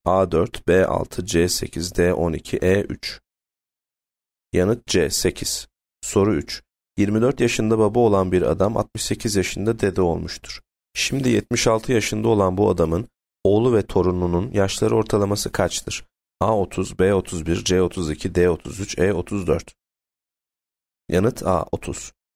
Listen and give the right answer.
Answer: Yanıt A 30.